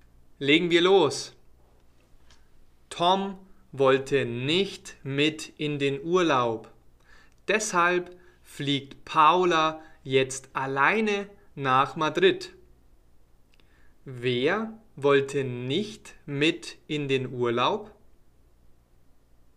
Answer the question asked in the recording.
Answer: Tom. Tom wollte nicht mit.